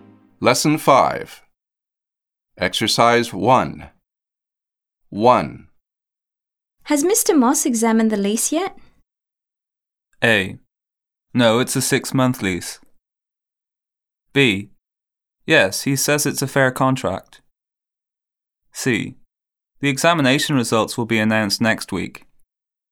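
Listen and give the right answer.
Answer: B: Yes, he says it's a fair contract.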